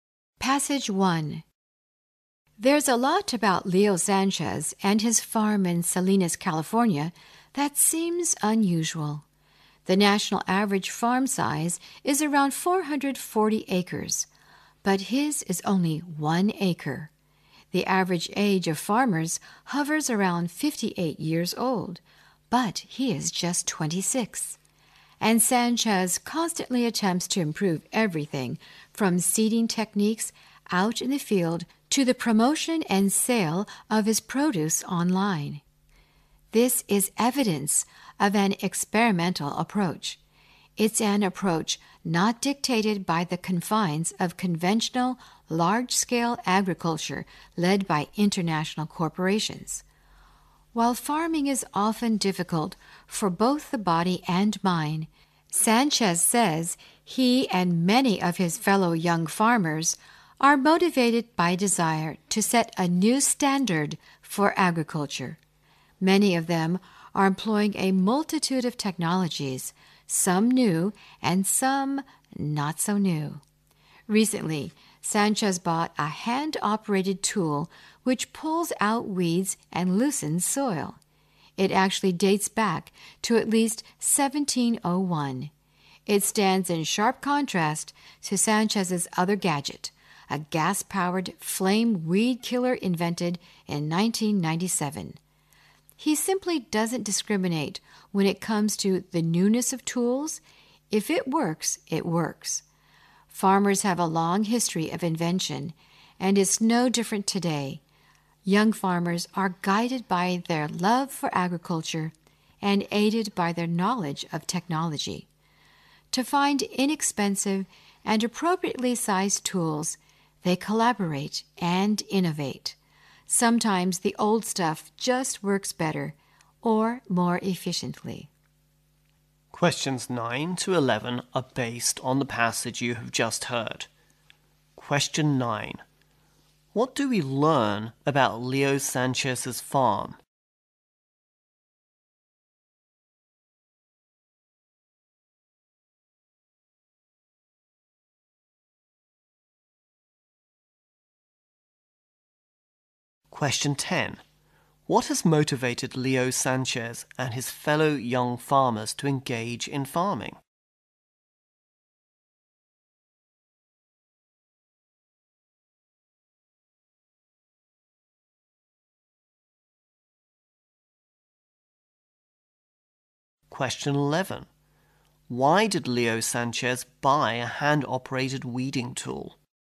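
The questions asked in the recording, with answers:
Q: What do we learn about Leo Sanchez's farm?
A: It is only one acre.

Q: What has motivated Leo Sanchez and his fellow young farmers to engage in farming?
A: The desire to set a new standard for agriculture.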